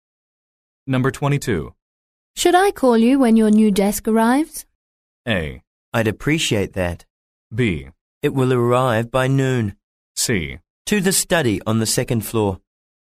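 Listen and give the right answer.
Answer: A: I'd appreciate that.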